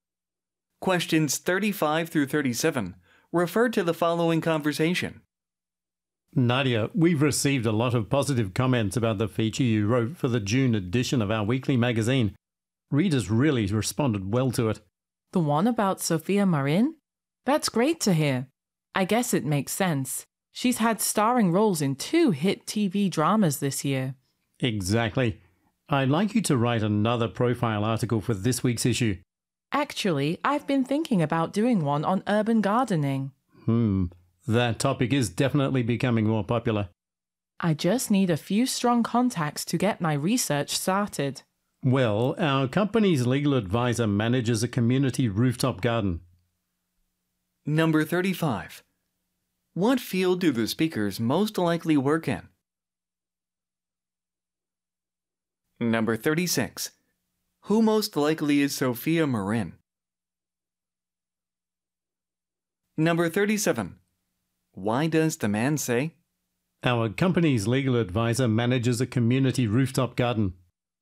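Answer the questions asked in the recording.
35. Magazine publishing
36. An actress
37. To suggest someone the woman could contact for her research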